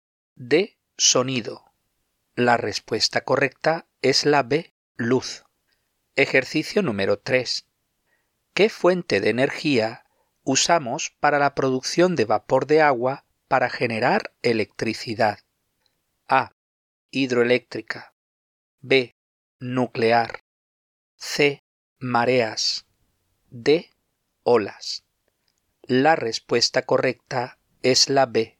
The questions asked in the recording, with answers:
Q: ¿Qué fuente de energía usamos para la producción de vapor de agua para generar electricidad?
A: La respuesta correcta es la B.